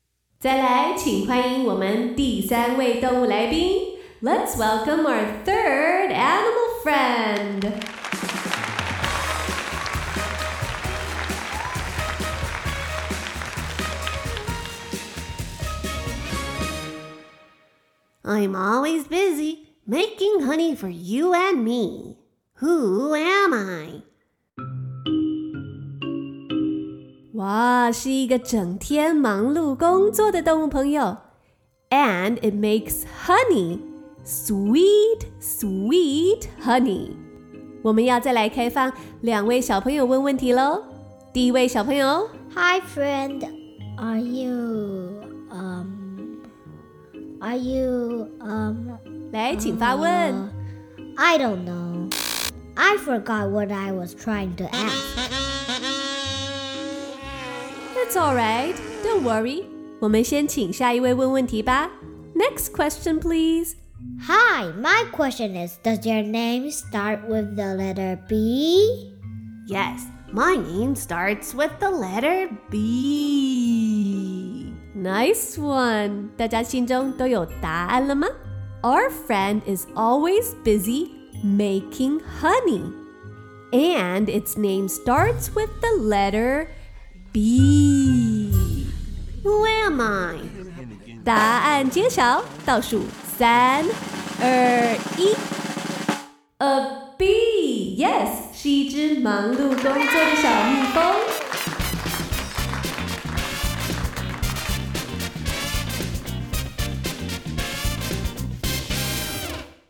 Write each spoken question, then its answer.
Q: Who am I?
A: A bee, yes